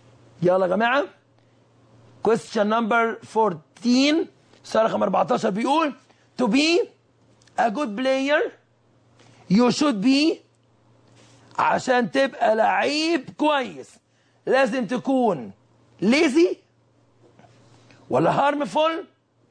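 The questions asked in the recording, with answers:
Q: to be a good player you should be عشان تبقى لعيب كويس لازم تكون lazy ولا harmful or helpful ولا useless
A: C: helpful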